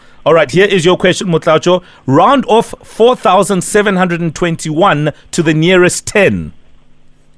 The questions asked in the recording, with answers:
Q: Round off 4,721 to the nearest 10.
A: If you round off 4,721 to the nearest 10, it is 4,720.